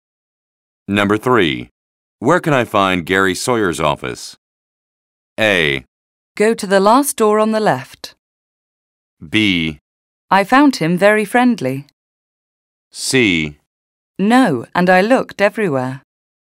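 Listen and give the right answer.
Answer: A: Go to the last door on the left.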